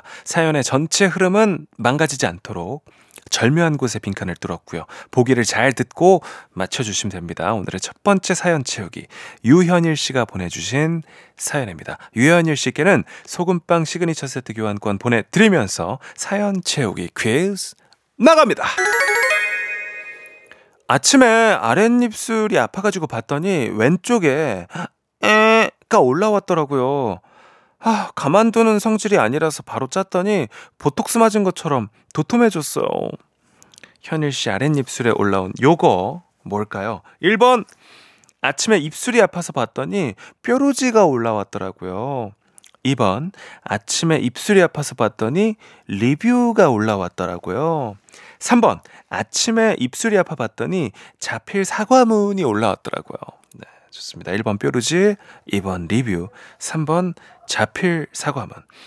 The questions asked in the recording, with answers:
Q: 현일 씨 아랫입술에 올라온 요거 뭘까요?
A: 이 중에 정답은 1번 뼈루지였습니다.